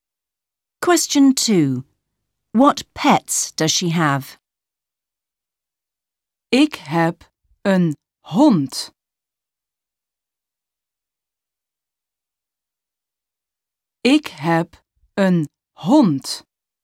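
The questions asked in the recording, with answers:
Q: What pets does she have?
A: A dog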